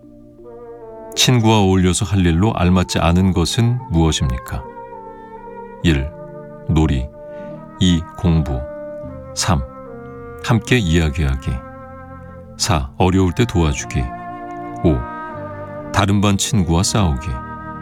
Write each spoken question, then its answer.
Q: 친구와 어울려서 할 일로 알맞지 않은 것은 무엇입니까?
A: 답은 5번일 텐데